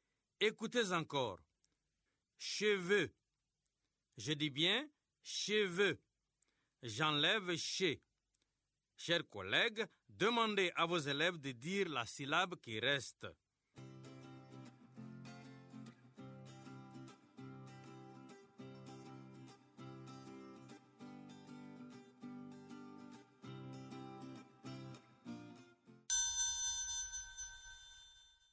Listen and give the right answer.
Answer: Il reste vœu.